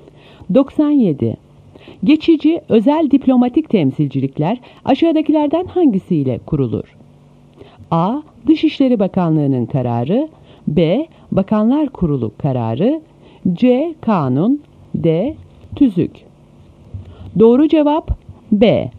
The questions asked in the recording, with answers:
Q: Geçici özel diplomatik temsilcilikler aşağıdakilerden hangisiyle kurulur?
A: Doğru cevap B.